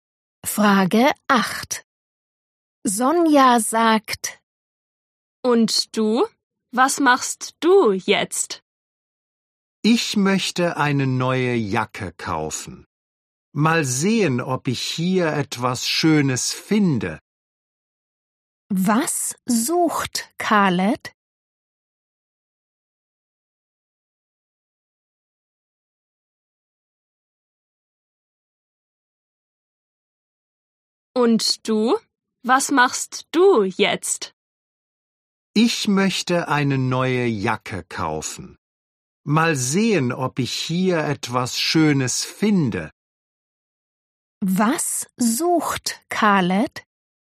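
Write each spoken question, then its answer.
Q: Was sucht Khaled?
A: eine neue Jacke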